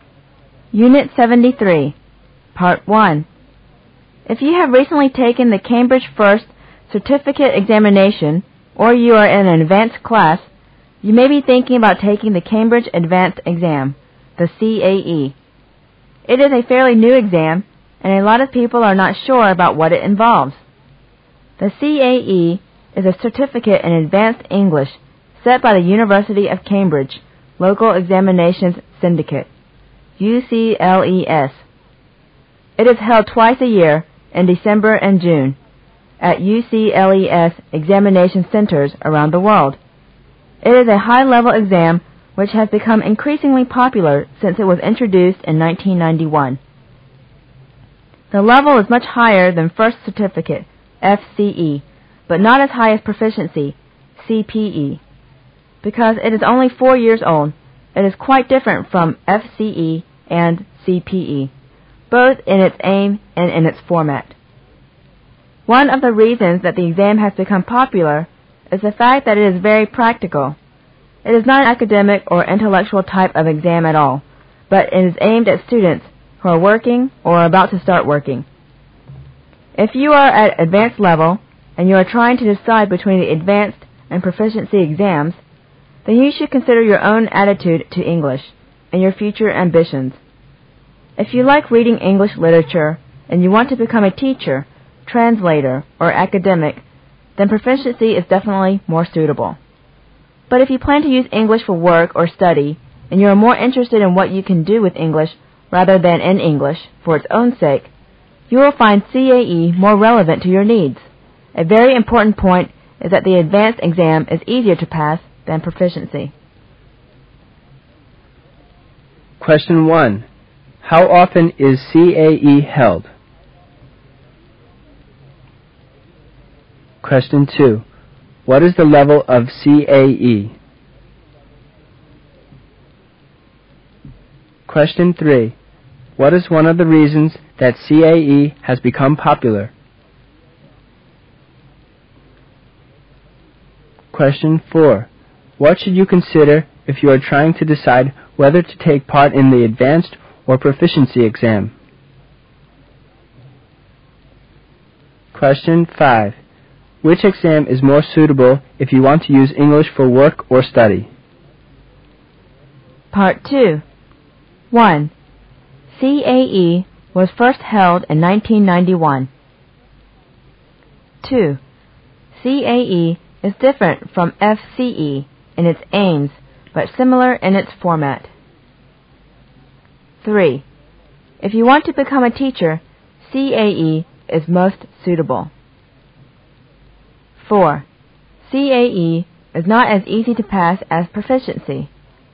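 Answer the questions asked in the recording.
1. Twice a year
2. Higher than FCE but lower than CPE
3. It is very practical
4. Your attitude to English and your future ambitions
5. CAE
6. True
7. False
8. False
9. False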